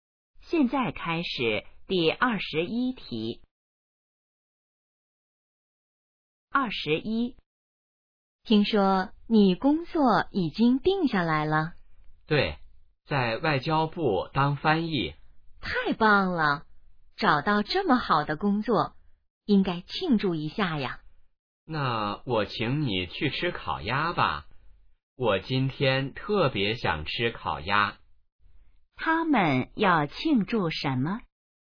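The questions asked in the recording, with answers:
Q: 他们要庆祝什么?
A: 找到了好工作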